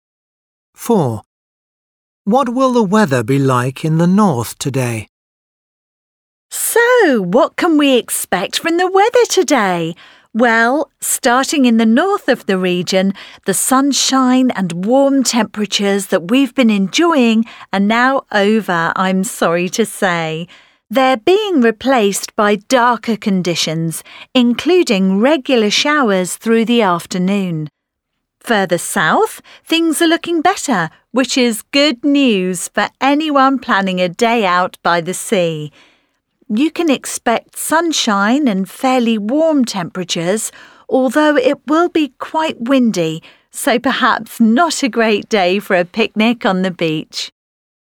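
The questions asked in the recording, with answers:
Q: What will the weather be like in the north today?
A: dark with regular showers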